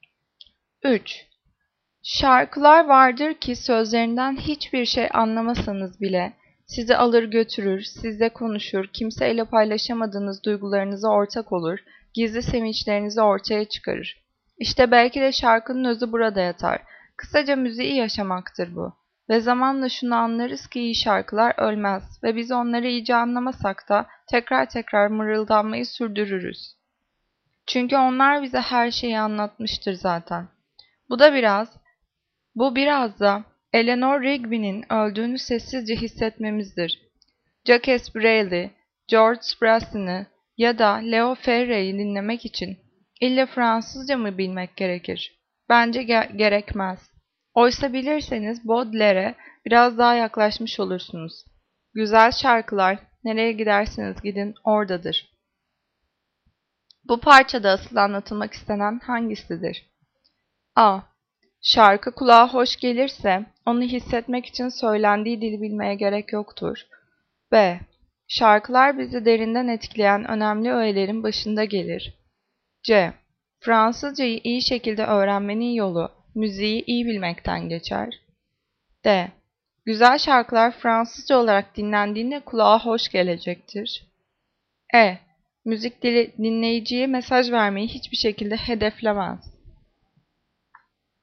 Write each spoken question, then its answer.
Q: Bu parçada asıl anlatılmak istenen hangisidir?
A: Cevap A. Şarkı kulağa hoş gelirse onu hissetmek için söylendiği dili bilmeye gerek yoktur.